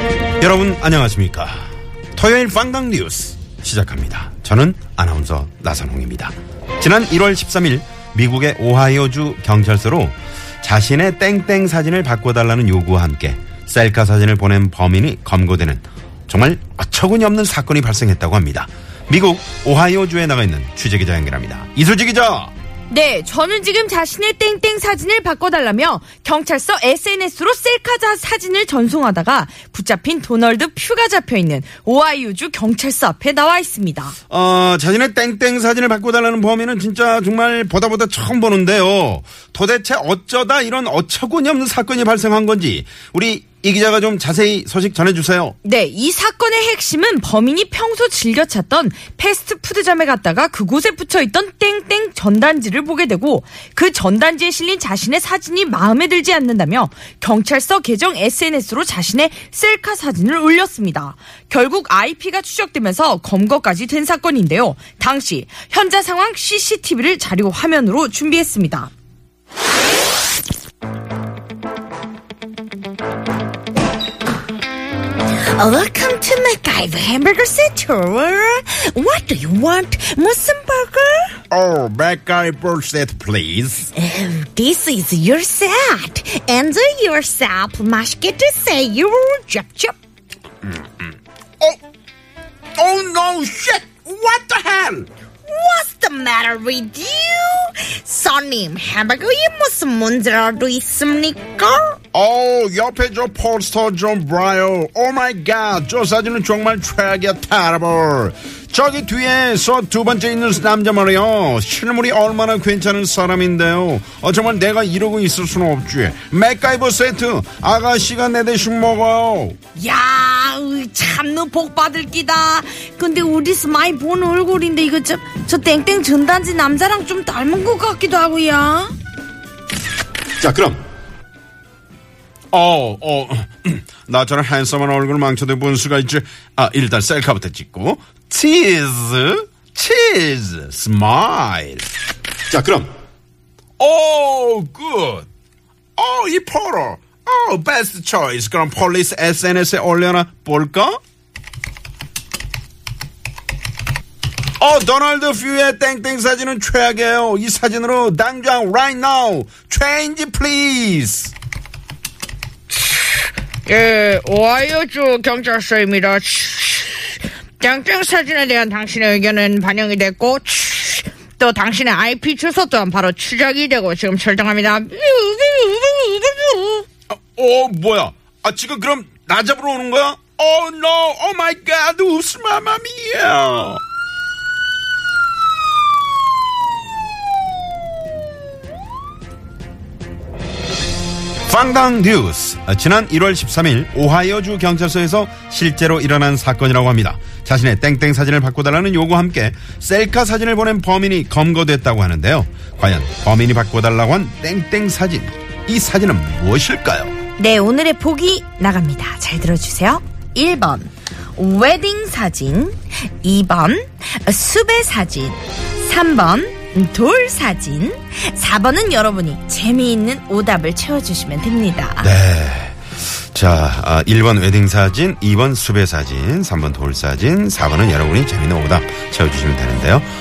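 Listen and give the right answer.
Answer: 2: 수배 사진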